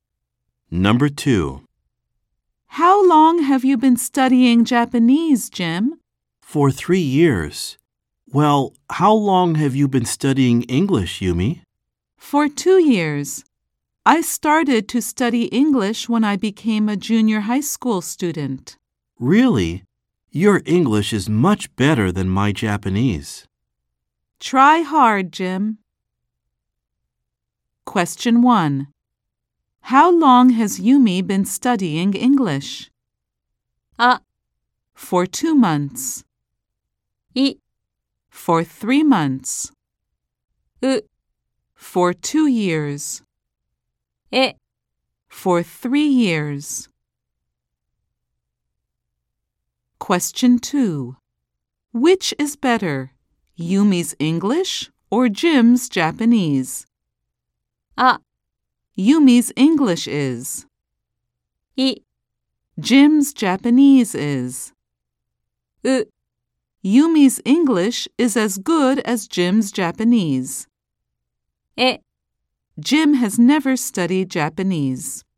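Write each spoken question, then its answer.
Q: How long has Yumi been studying English?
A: う: For 2 years.

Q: Which is better, Yumi's English or Jim's Japanese?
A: あ: Yumi's English is.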